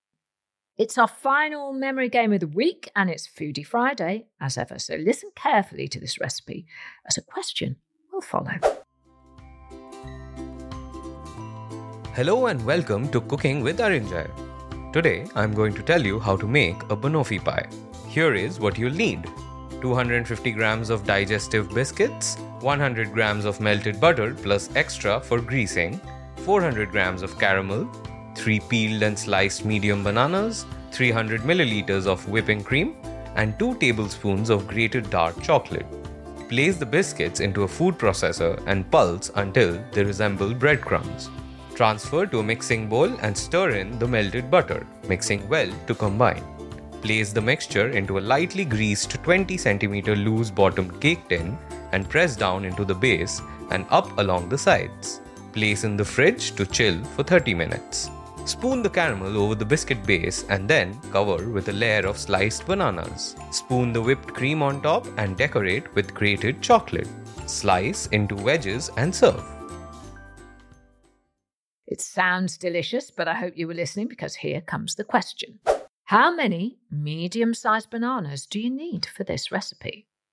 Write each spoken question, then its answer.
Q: How many medium-sized bananas do you need for this recipe?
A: And the answer was 3.